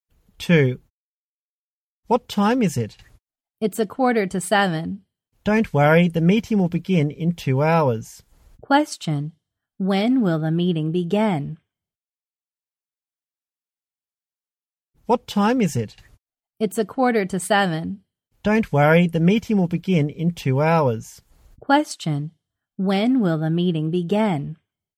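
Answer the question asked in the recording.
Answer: At 8:45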